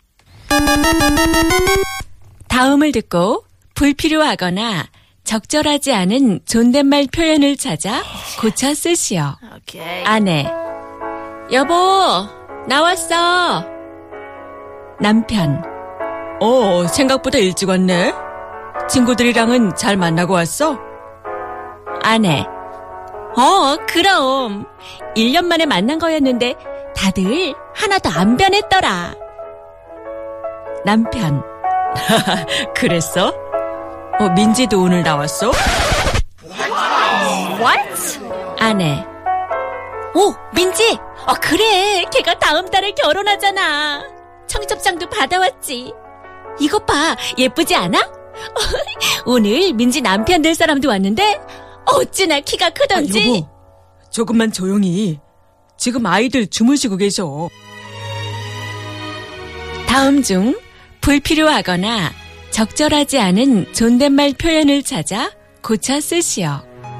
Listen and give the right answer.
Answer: 아이들 주무시고 계셔. Our writer thinks that Bajaj is right.